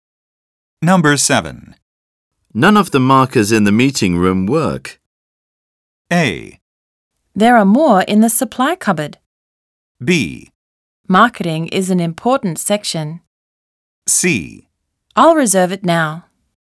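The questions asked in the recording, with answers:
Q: None of the markers in the meeting room work.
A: A: There are more in the supply cupboard.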